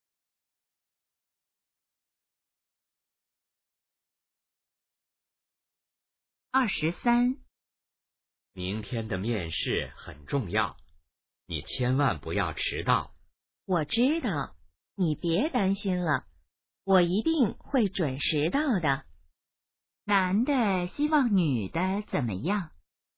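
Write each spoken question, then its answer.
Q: 男的希望女的怎么样?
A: 面试别迟到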